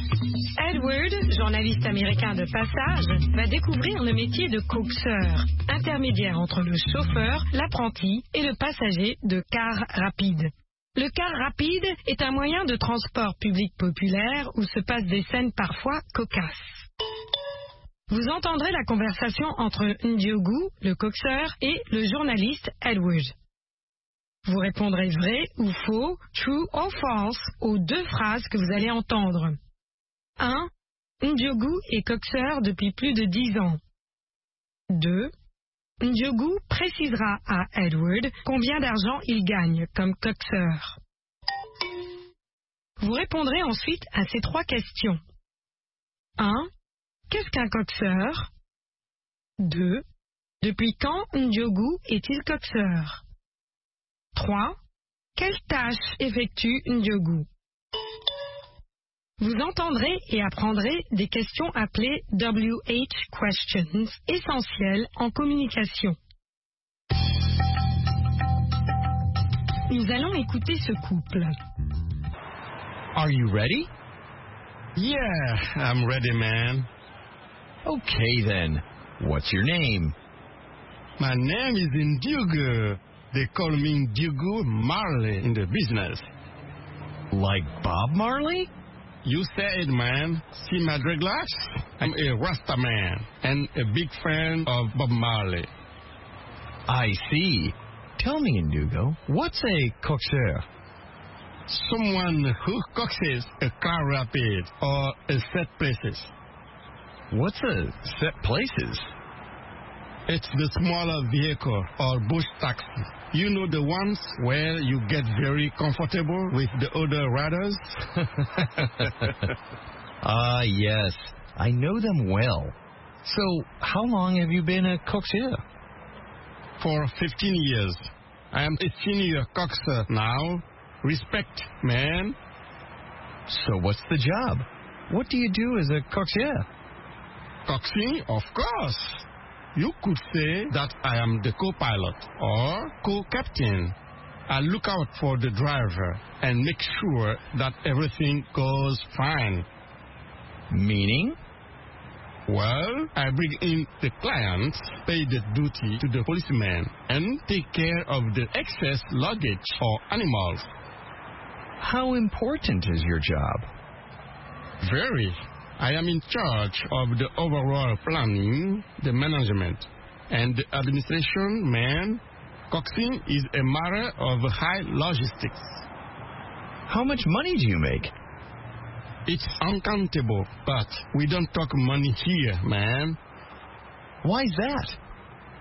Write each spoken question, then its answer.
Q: Ndiogou est coaxeur depuis plus de 10 ans.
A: L'énoncé 1 est vrai.

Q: Ndiogou précisera à Edward combien d'argent il gagne comme coaxeur.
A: L'énoncé 2 est faux.

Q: Qu'est-ce qu'un coaxeur?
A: Quelqu'un qui coxe un véhicule.

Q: Depuis quand Ndiogou est-il coaxeur?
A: Depuis 15 ans maintenant.

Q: Quelles tâches effectue Ndiogou?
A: Des tâches de planning, de gestion et d'administration.